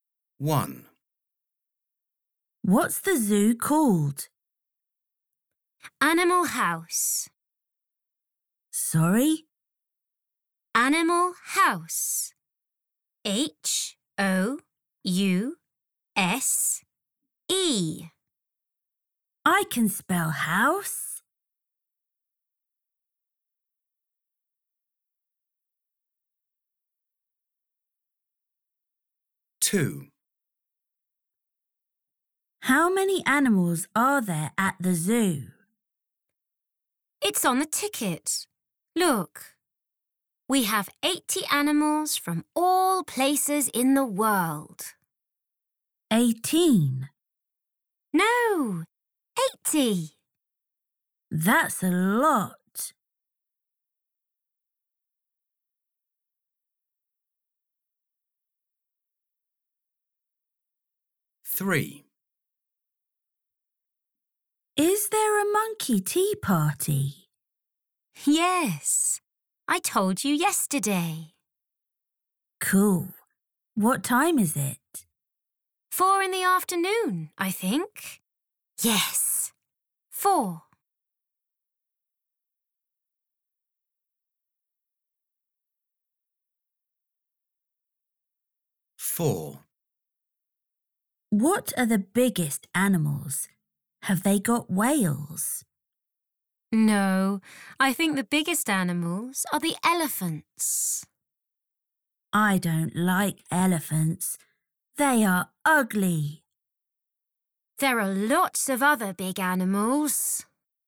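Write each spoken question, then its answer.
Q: What's the zoo called?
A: Animal House

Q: How many animals are there at the zoo?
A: 80

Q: Is there a monkey tea party?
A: Yes, at 4 in the afternoon

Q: What are the biggest animals?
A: The elephants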